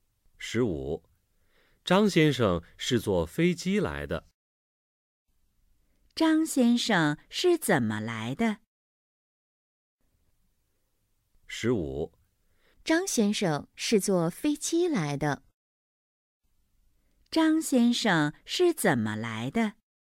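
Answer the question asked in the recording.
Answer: 坐飞机来的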